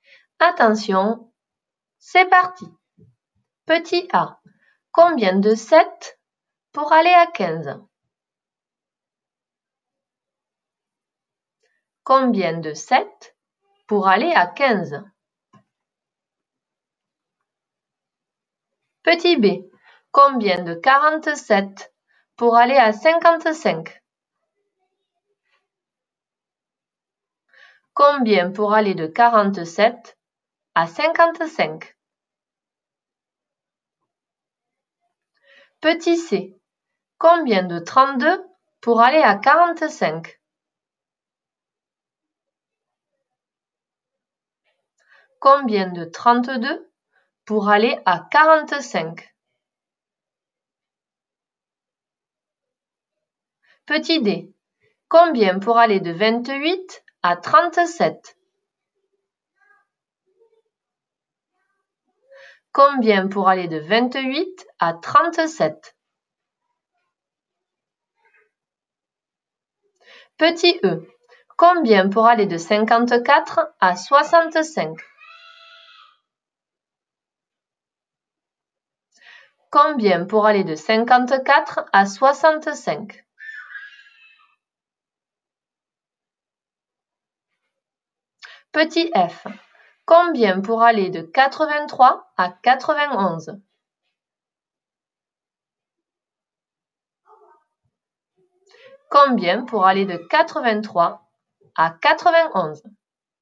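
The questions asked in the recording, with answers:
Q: combien de 32 pour aller à 45?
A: 13

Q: combien pour aller de 54 à 65?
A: 11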